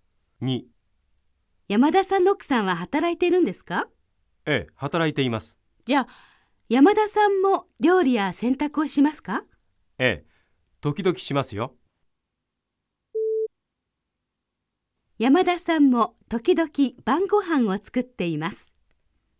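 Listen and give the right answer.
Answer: ○(正しい)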